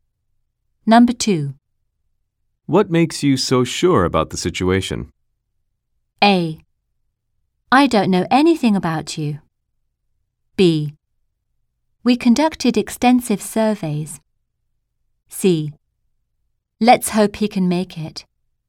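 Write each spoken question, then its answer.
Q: What makes you so sure about the situation?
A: B: We conducted extensive surveys.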